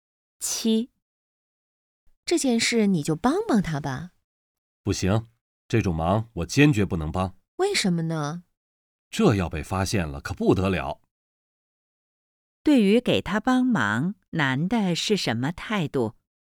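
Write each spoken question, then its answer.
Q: 对于给他帮忙,男的是什么态度?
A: 坚决不帮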